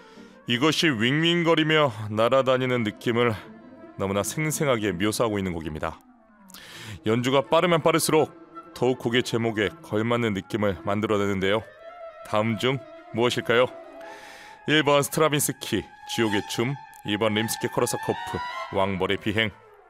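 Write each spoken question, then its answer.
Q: 다음 중 무엇일까요?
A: 2: 림스키 코르사코프, 왕벌의 비행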